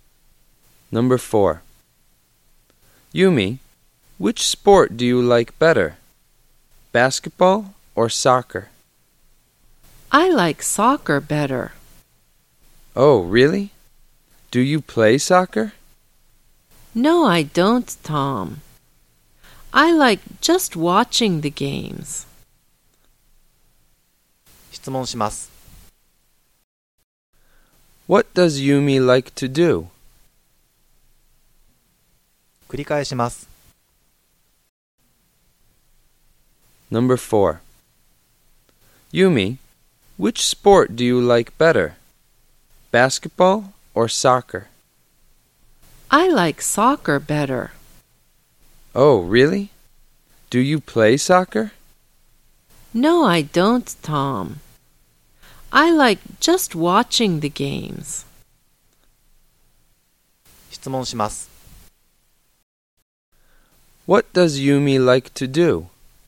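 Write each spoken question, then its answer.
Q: What does Yumi like to do?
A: Watching soccer games.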